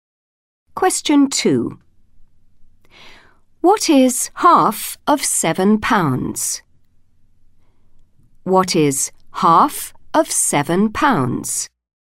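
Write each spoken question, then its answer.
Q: What is half of £7?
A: £3.50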